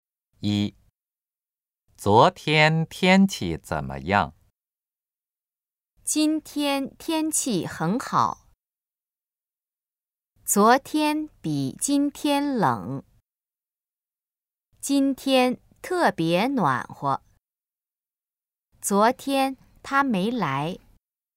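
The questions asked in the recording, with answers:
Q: 昨天天气怎么样?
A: 昨天比今天冷。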